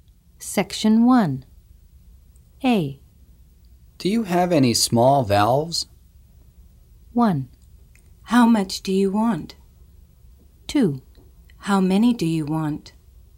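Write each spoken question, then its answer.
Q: Do you have any small valves?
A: 2: How many do you want?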